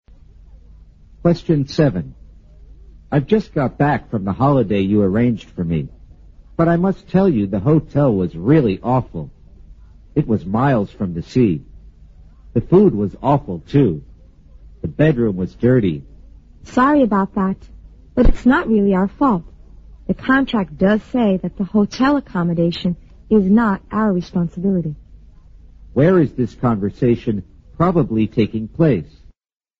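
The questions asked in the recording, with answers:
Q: Where is this conversation probably taking place?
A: At a travel agency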